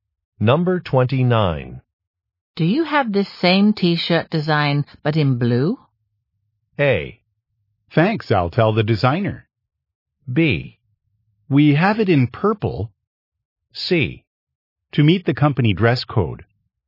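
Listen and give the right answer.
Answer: B: We have it in purple.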